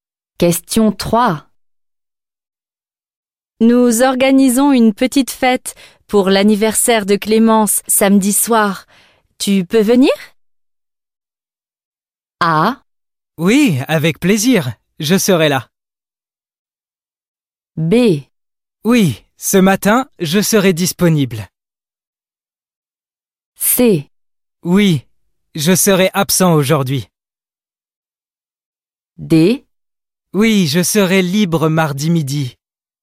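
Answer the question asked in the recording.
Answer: A: Oui, avec plaisir. Je serai là.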